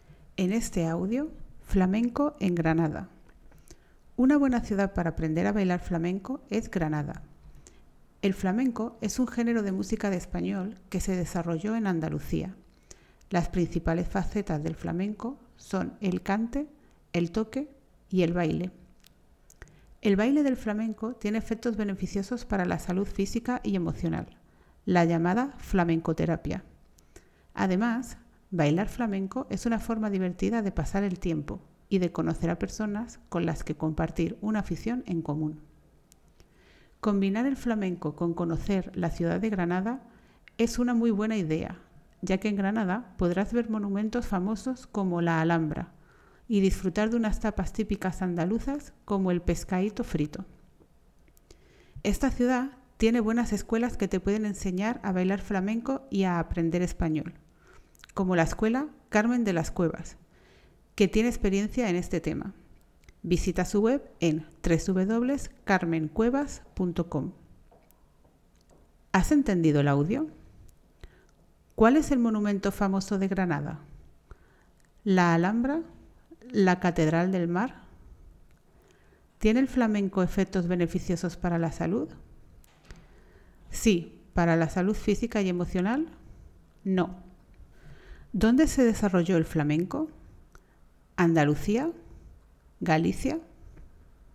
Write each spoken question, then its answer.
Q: ¿Cuál es el monumento famoso de Granada?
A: La respuesta correcta es la Alhambra.

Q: ¿Dónde se desarrolló el flamenco?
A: Andalucía.